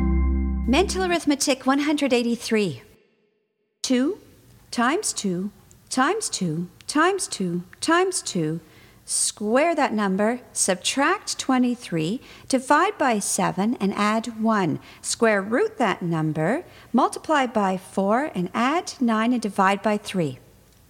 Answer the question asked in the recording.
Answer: And the answer is 19.